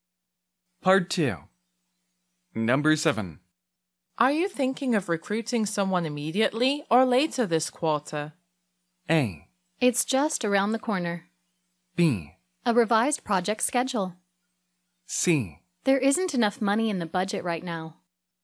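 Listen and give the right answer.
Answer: C: There isn't enough money in the budget right now.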